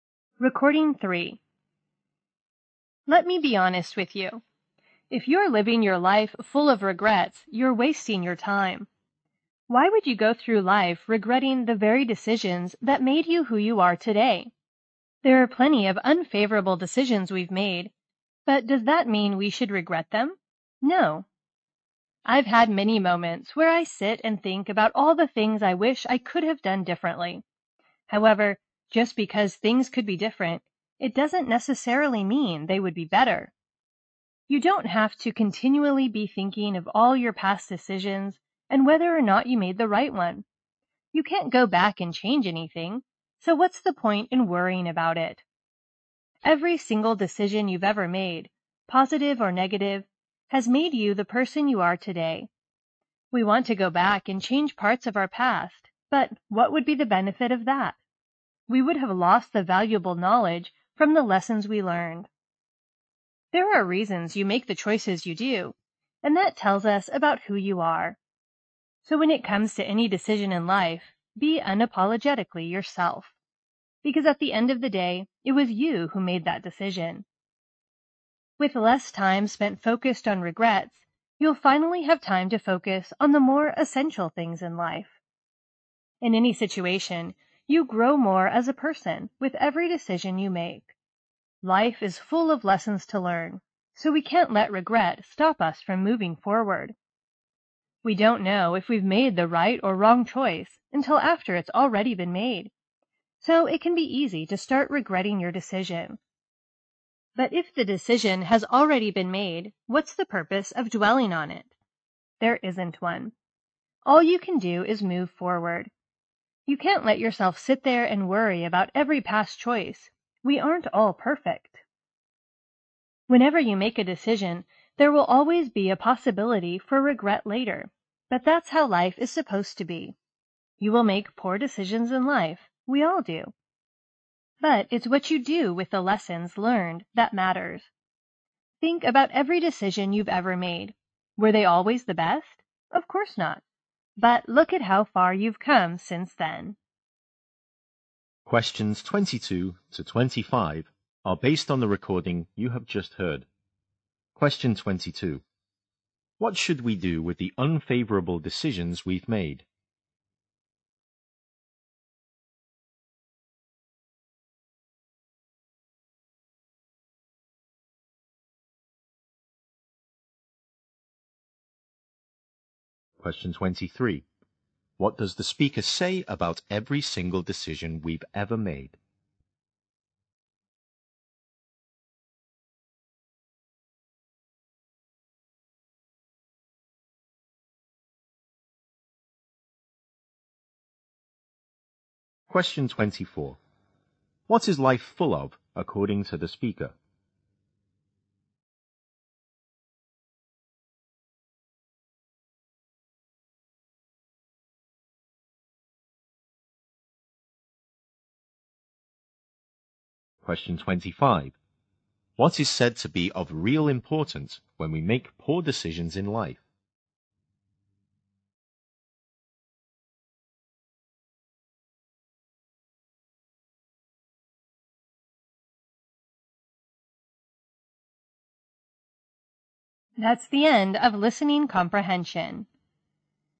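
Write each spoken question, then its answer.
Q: What should we do with the unfavorable decisions we've made?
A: Not regret them but move forward

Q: What does the speaker say about every single decision we've ever made?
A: It has made us who we are today

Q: What is life full of, according to the speaker?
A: Lessons to learn

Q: What is said to be of real importance when we make poor decisions in life?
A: What we do with the lessons learned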